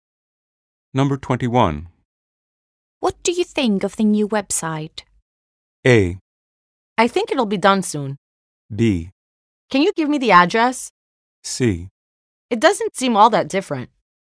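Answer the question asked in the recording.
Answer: C: It doesn't seem all that different.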